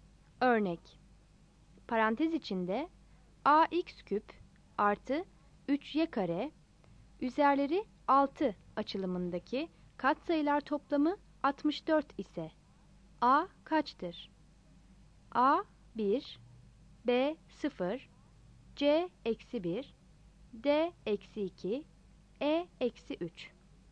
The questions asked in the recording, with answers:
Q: Parantez içinde ax küp artı 3y kare üzerleri 6 açılımındaki katsayılar toplamı 64 ise a kaçtır?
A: Yanıt C'dir.